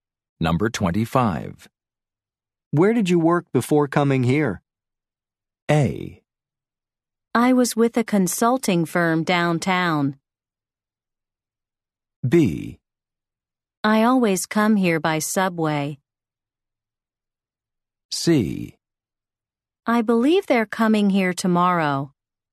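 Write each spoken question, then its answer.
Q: Where did you work before coming here?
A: A: I was with a consulting firm downtown.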